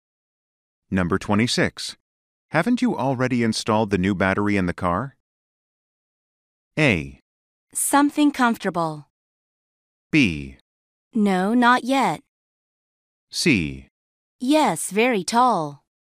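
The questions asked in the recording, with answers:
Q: Haven't you already installed the new battery in the car?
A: B: No, not yet.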